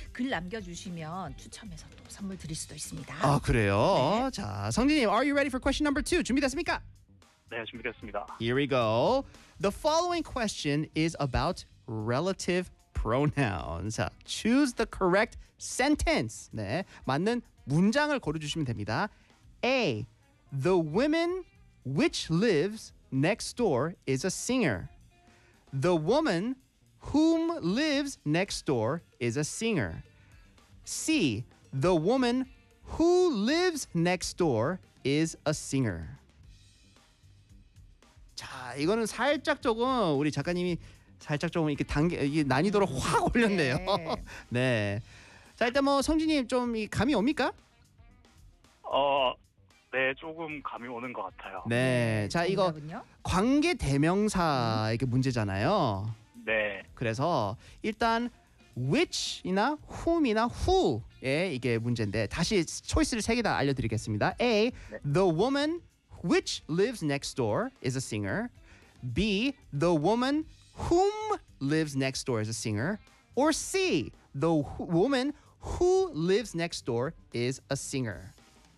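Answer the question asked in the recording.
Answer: C: The woman who lives next door is a singer.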